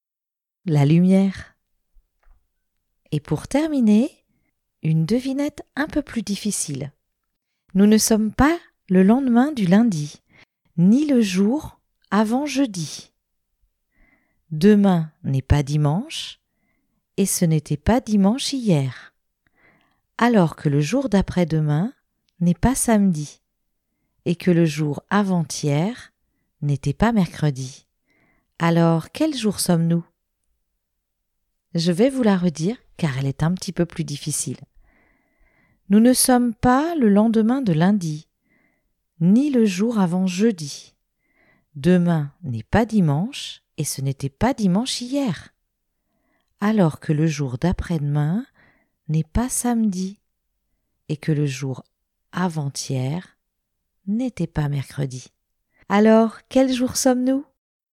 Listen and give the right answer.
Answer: Le dimanche.